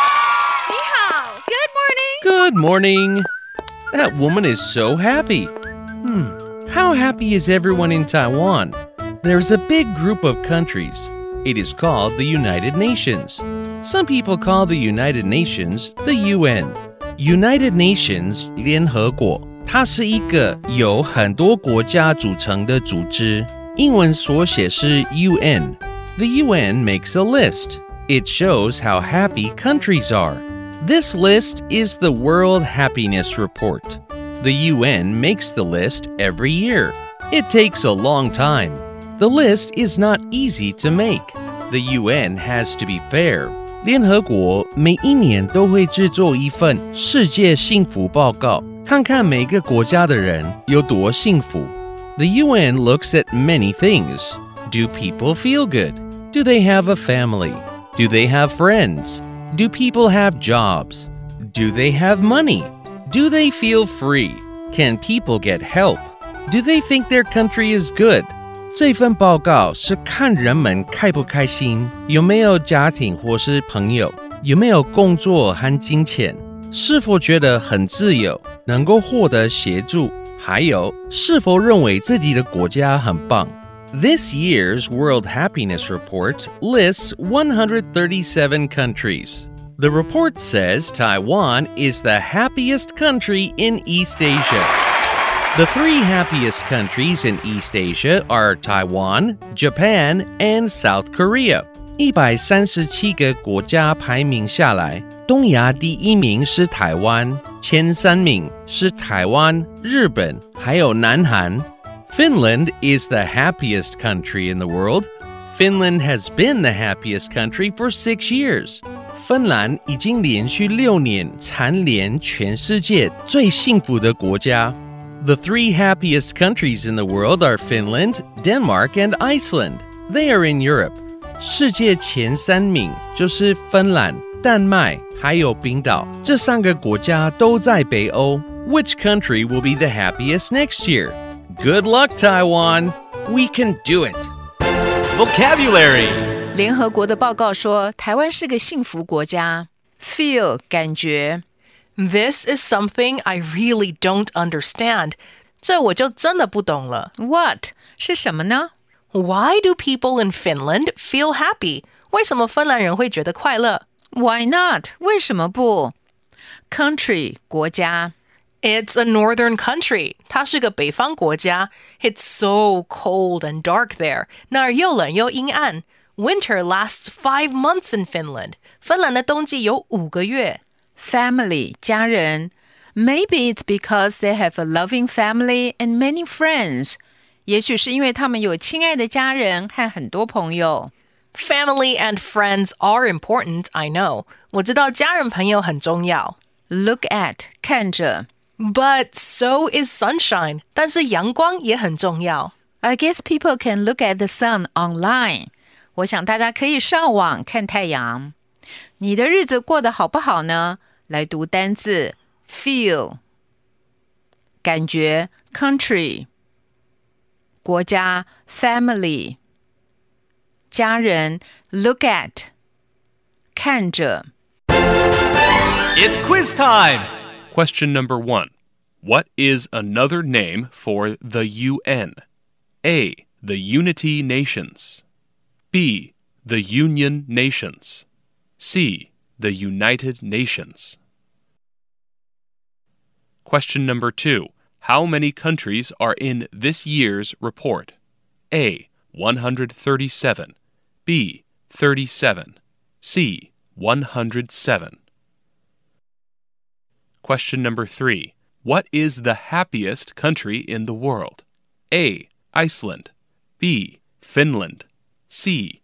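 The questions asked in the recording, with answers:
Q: What is another name for the UN?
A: C: The United Nations.

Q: How many countries are in this year's report?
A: A: 137.

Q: What is the happiest country in the world?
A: B: Finland.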